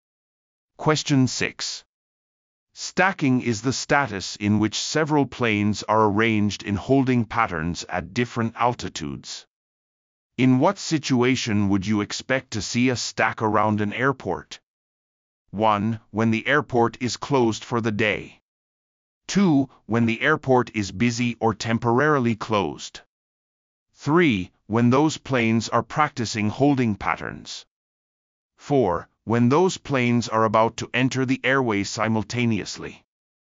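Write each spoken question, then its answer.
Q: In what situation would you expect to see a stack around an airport?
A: 2: When the airport is busy or temporarily closed.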